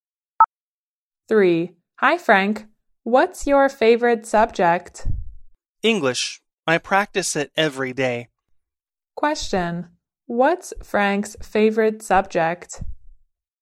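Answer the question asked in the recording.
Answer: English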